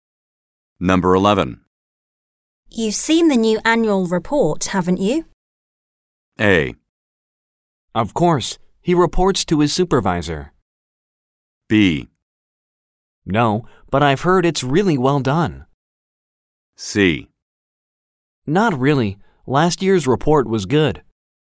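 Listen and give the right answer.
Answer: B: No, but I've heard it's really well done.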